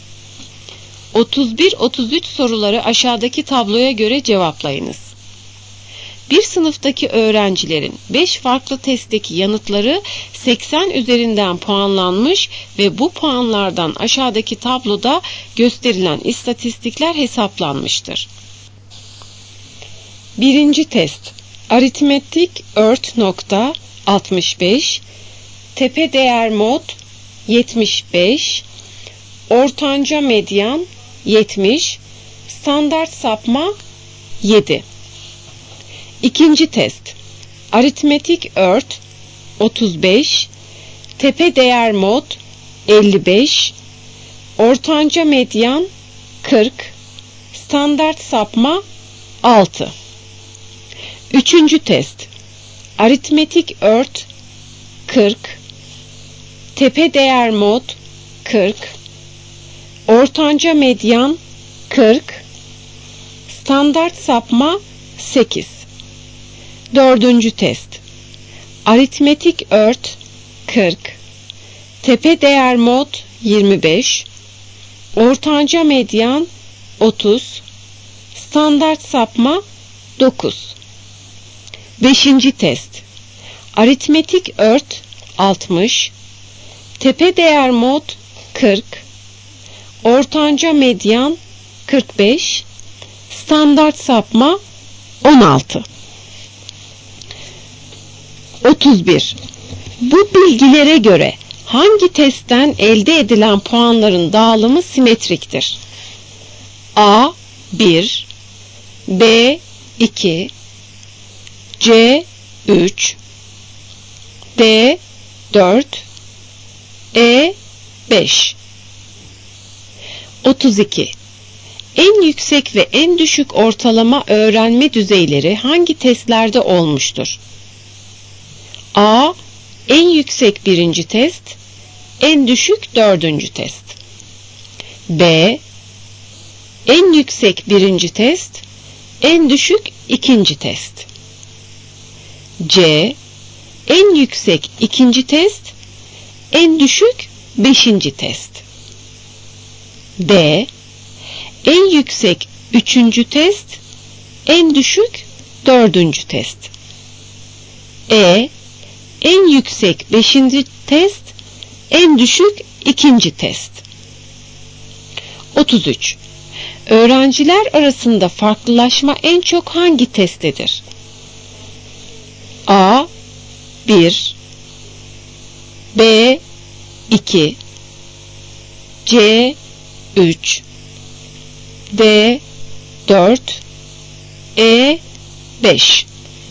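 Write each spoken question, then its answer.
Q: Bu bilgilere göre hangi testten elde edilen puanların dağılımı simetriktir?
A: C: 3

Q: En yüksek ve en düşük ortalama öğrenme düzeyleri hangi testlerde olmuştur?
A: B: En yüksek birinci test, en düşük ikinci test.

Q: Öğrenciler arasında farklılaşma en çok hangi testtedir?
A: E: 5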